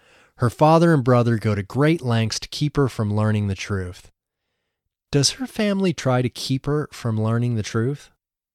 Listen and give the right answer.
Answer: Yes, her family goes to great lengths to keep her from learning the truth.